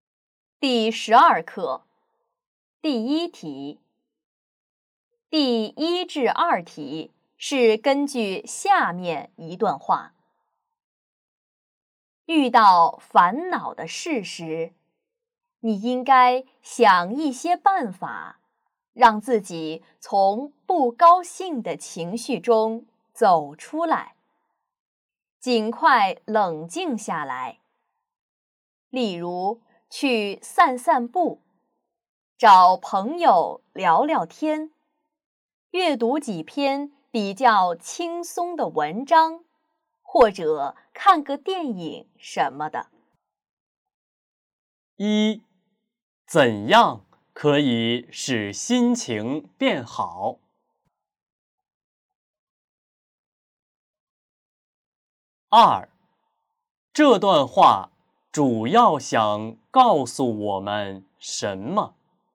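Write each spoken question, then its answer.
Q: 一,怎样可以使心情变好?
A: 散步、找朋友聊天、阅读轻松的文章或看电影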